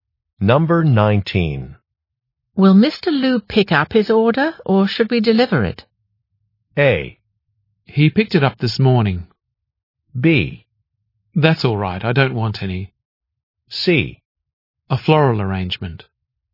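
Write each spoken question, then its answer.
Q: Will Mr. Liu pick up his order, or should we deliver it?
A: A: He picked it up this morning.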